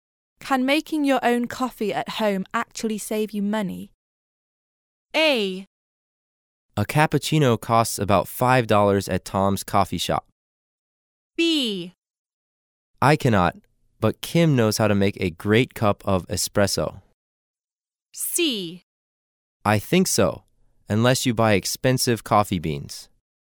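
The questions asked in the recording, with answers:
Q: Can making your own coffee at home actually save you money?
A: C: I think so, unless you buy expensive coffee beans.

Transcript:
Where did you buy it?
[听力原文] W: Can making your own coffee at home actually save you money? M: A. A cappuccino costs about $5 at Tom's Coffee shop. M: B. I cannot, but Kim knows how to make a great cup of espresso. M: C. I think so, unless you buy expensive coffee beans.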